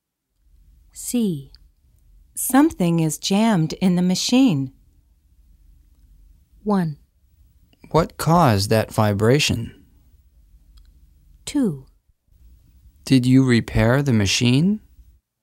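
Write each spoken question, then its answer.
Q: Something is jammed in the machine.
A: 1: What caused that vibration?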